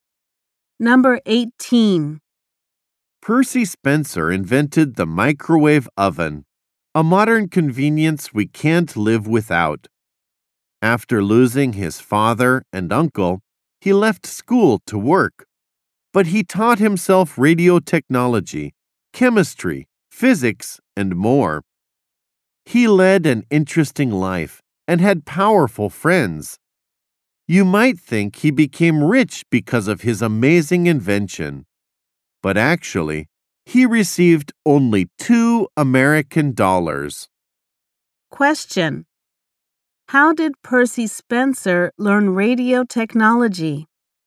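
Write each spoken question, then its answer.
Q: How did Percy Spencer learn radio technology?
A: He taught himself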